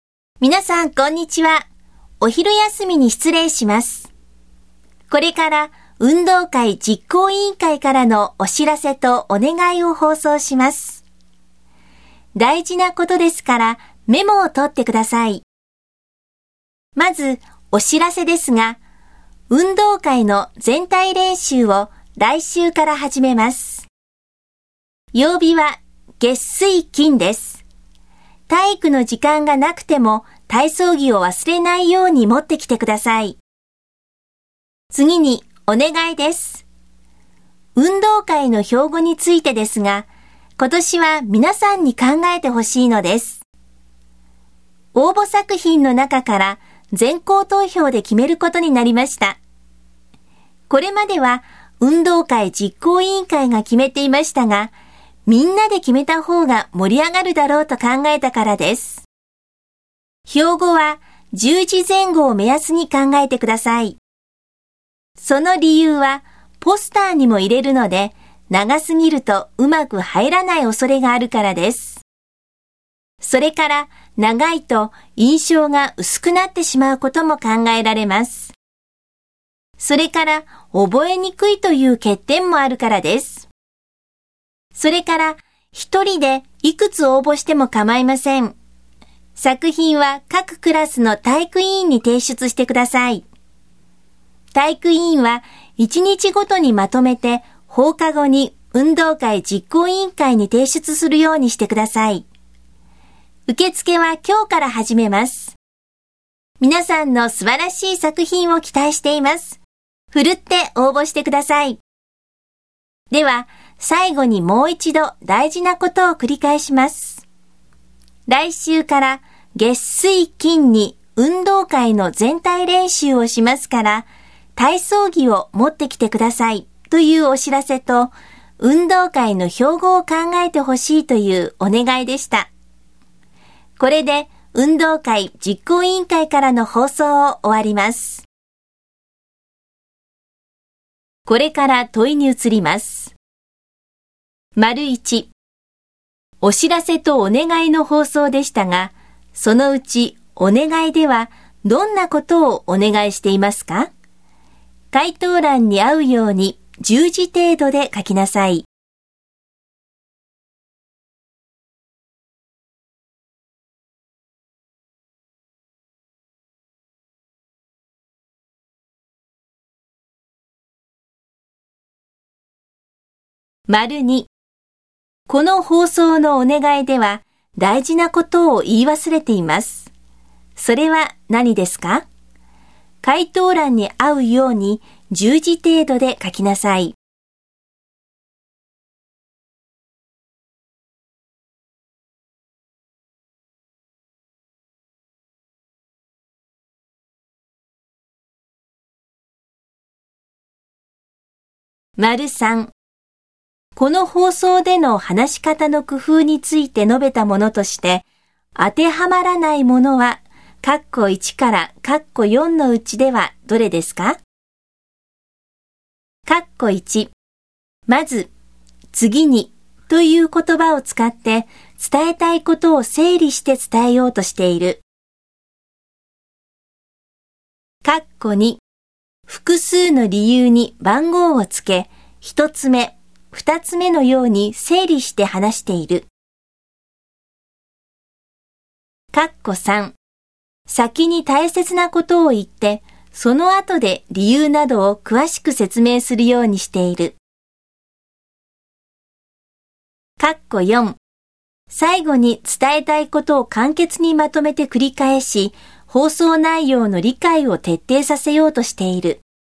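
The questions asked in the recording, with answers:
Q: お知らせとお願いの放送でしたが、そのうちお願いではどんなことをお願いしていますか?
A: 運動会の標語を考えること

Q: この放送での話し方の工夫について述べたものとして、当てはまらないものは、括弧1から括弧4のうちではどれですか?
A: 2: 複数の理由に番号をつけ、一つ目、二つ目のように整理して話している。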